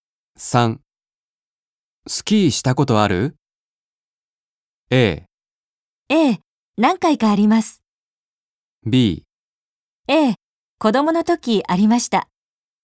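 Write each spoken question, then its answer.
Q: スキーしたことある?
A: A: 何回かあります。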